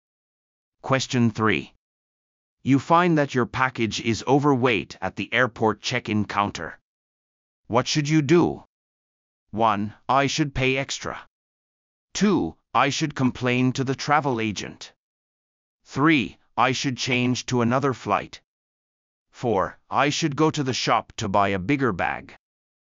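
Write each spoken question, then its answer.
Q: What should you do?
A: 1: I should pay extra.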